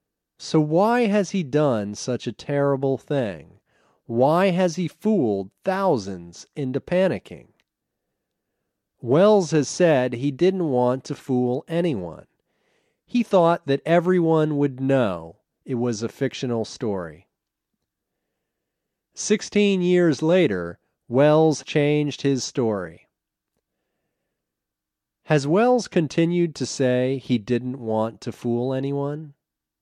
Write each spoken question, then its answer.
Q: Has Welles continued to say he didn't want to fool anyone?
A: No, he hasn't continued to say he didn't want to fool anyone.